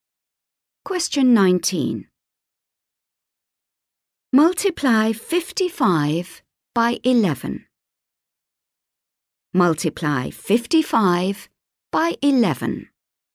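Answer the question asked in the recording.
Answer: 605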